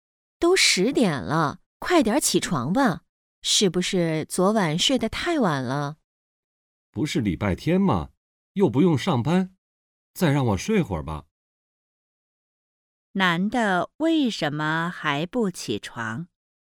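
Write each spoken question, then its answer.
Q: 男的为什么还不起床?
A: 今天是礼拜天,不用上班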